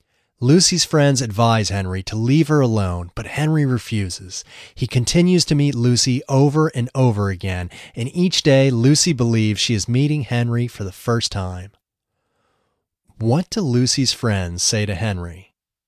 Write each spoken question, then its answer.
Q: What do Lucy's friends say to Henry?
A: They advise Henry to leave her alone.